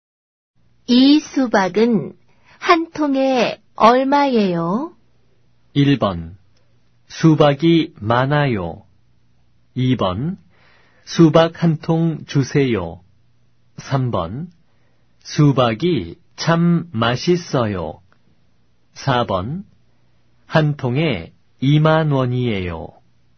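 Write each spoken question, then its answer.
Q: 수박은 한 통에 얼마예요?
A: 4: 한 통에 2만 원이에요.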